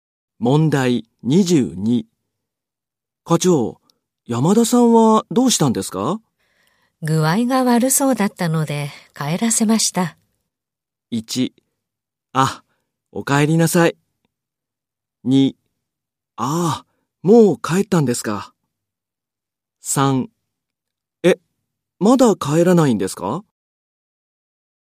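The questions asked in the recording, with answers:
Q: 山田さんはどうしたんですか?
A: 3: ああ、もう帰ったんですか。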